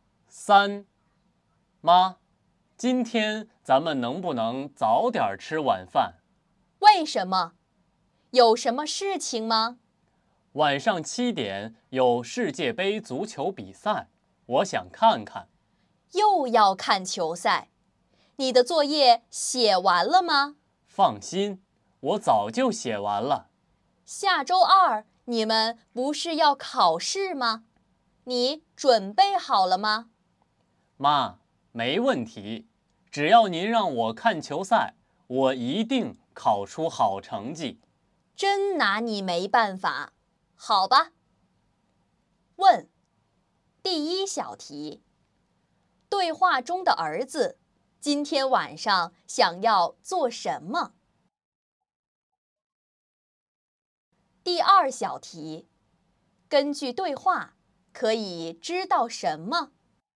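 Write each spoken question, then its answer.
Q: 对话中的儿子今天晚上想要做什么?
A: 看世界杯足球比赛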